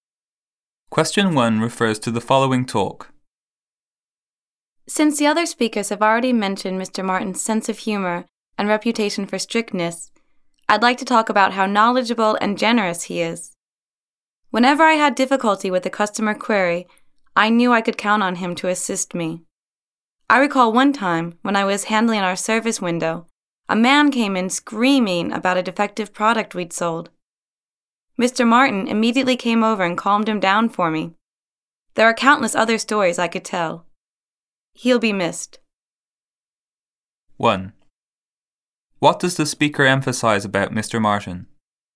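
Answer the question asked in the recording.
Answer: He is knowledgeable and generous (helpful to staff)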